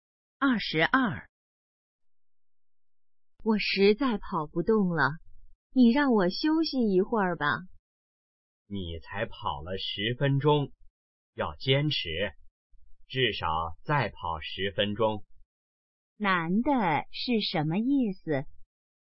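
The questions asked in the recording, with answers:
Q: 男的是什么意思?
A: 要坚持,再跑10分钟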